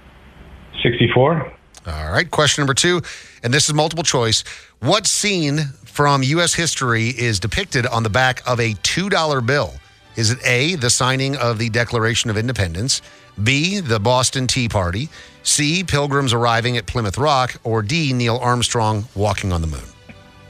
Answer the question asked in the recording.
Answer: It's A, signing the Declaration of Independence.